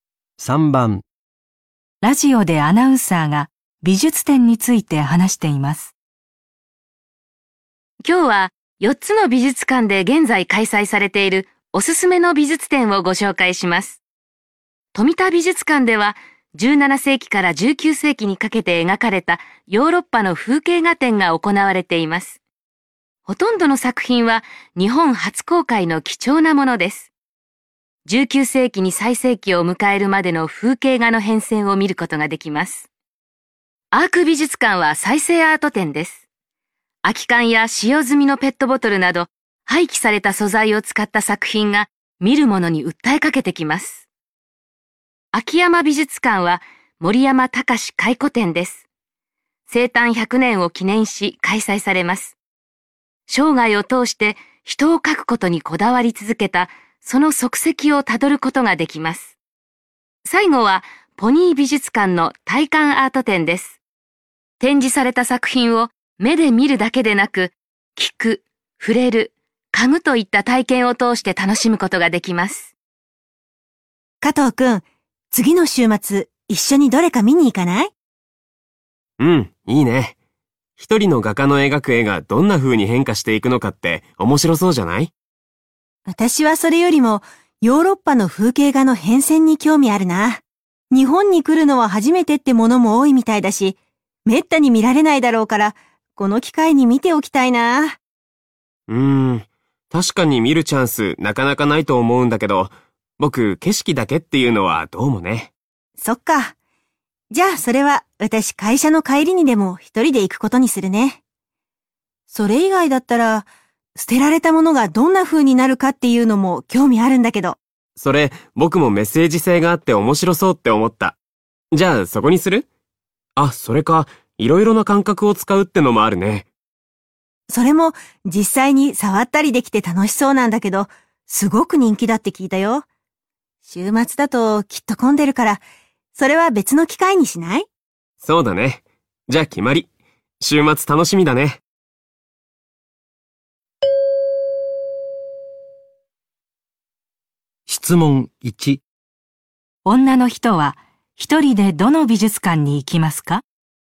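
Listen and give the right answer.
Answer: 富田美術館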